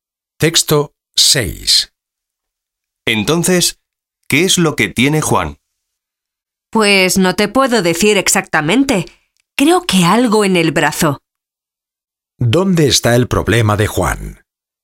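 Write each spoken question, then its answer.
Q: ¿Dónde está el problema de Juan?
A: En el brazo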